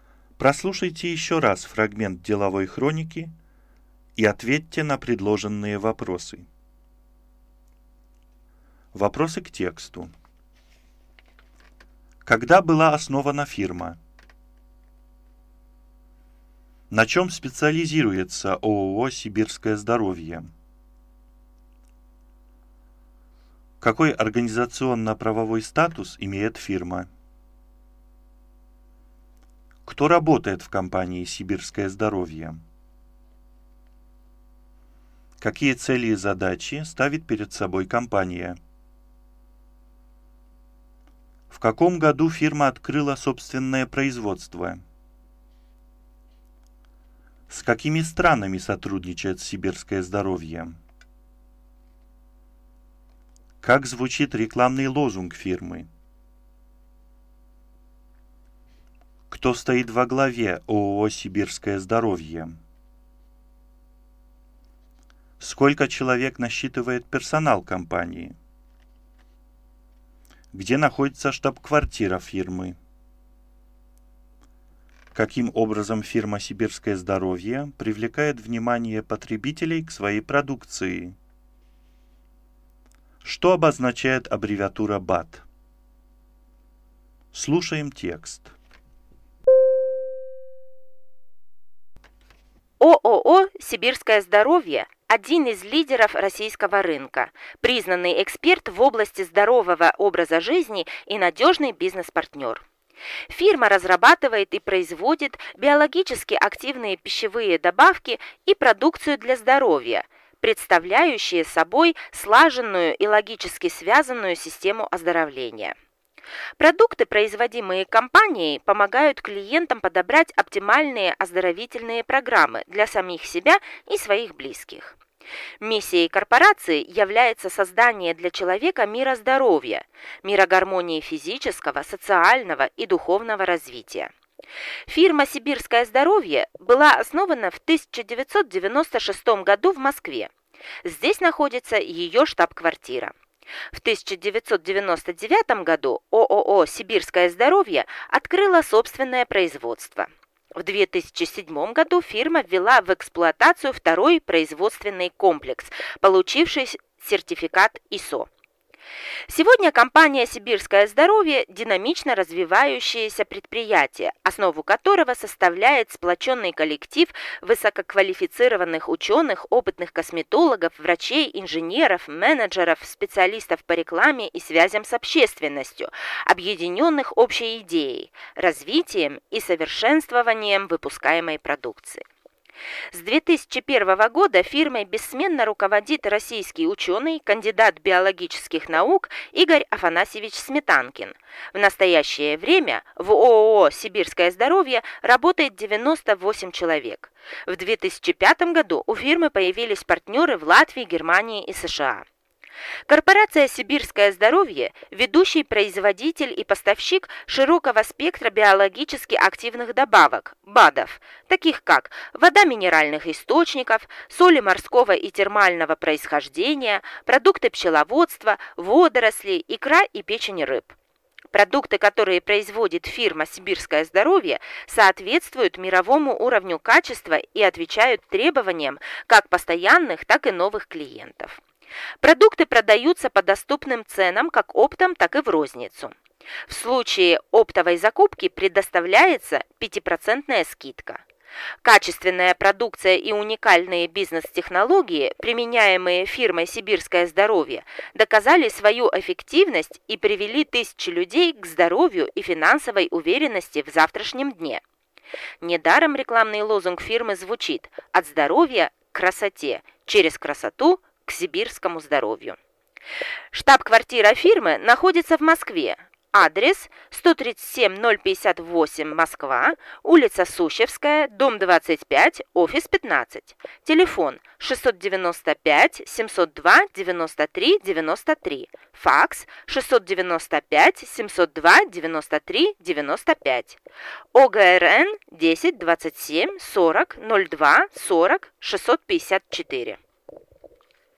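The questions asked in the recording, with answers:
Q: Когда была основана фирма?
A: В 1996 году

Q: На чем специализируется ООО «Сибирское здоровье»?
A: На разработке и производстве биологически активных пищевых добавок и продукции для здоровья

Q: Какой организационно-правовой статус имеет фирма?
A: ООО

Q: Кто работает в компании «Сибирское здоровье»?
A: Учёные, косметологи, врачи, инженеры, менеджеры, специалисты по рекламе и связям с общественностью

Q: Какие цели и задачи ставит перед собой компания?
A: Создание для человека мира здоровья, гармонии физического, социального и духовного развития

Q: В каком году фирма открыла собственное производство?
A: В 1999 году

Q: С какими странами сотрудничает «Сибирское здоровье»?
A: С Латвией, Германией и США

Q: Как звучит рекламный лозунг фирмы?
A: «От здоровья к красоте, через красоту – к сибирскому здоровью»

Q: Кто стоит во главе ООО «Сибирское здоровье»?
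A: Игорь Афанасьевич Сметанкин

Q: Сколько человек насчитывает персонал компании?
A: 98 человек

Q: Где находится штаб-квартира фирмы?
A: В Москве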